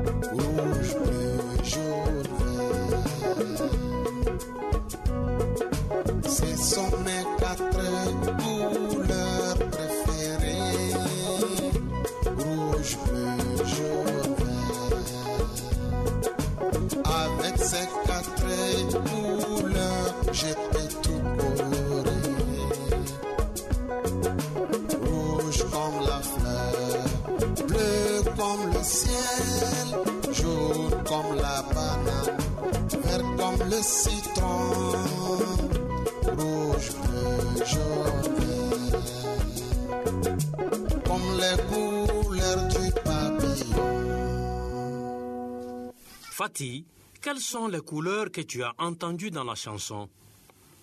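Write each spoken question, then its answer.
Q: Fatih, quelles sont les couleurs que tu as entendues dans la chanson?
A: rouge, bleu, jaune, vert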